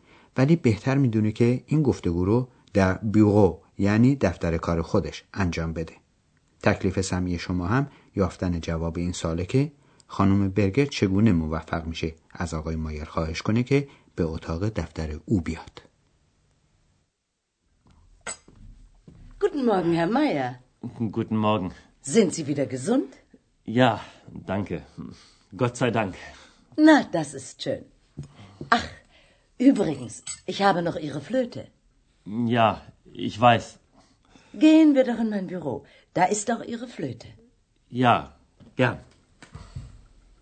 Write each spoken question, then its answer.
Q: تکلیف سمی شما هم یافتن جواب این سواله که خانم برگر چگونه موفق میشه از آقای مایر خواهش کنه که به اتاق دفتر او بیاد.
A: و با لحن محبت‌آمیز و به صورت خواهش به آقای مایر میگه بفرمایید برویم دفتر من.